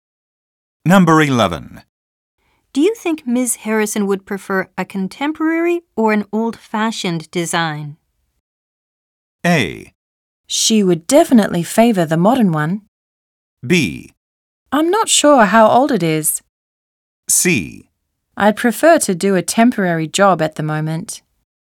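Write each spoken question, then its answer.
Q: Do you think Ms. Harrison would prefer a contemporary or an old-fashioned design?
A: A: She would definitely favor the modern one.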